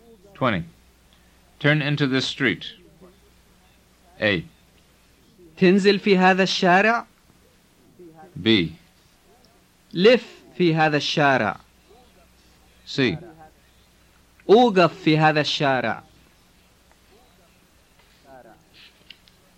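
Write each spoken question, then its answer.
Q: Turn into this street.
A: B: لف في هذا الشارع.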